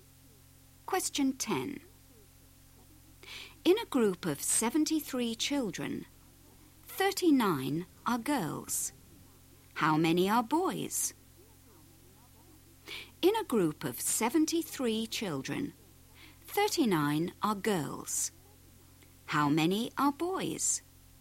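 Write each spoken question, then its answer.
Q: How many are boys?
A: 34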